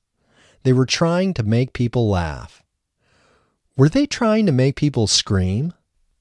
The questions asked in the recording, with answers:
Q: Were they trying to make people scream?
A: No, they weren't trying to make people scream.